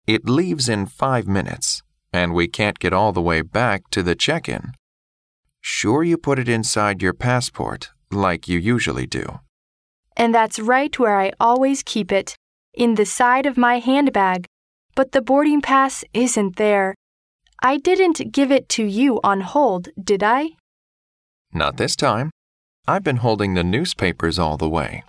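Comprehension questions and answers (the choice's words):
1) Where does the conversation probably take place?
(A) At a news agency.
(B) At an airport.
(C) In a handbag shop.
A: At an airport.

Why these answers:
女士提到but the boarding pass isn't there,boarding pass为"登机牌",由此可知对话发生在机场。

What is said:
M: It leaves in five minutes and we can't get all the way back to the check-in—sure you put it inside your passport, like you usually do.
W: And that's right where I always keep it, in the side of my handbag, but the boarding pass isn't there. I didn't give it to you on hold, did I?
M: Not this time. I've been holding the newspapers all the way!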